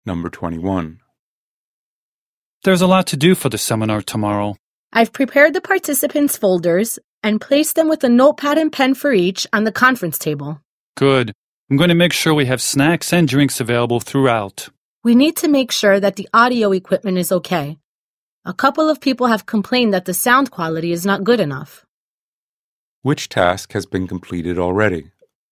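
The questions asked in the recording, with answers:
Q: Which task has been completed already?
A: Preparing the participants' folders and placing them on the conference table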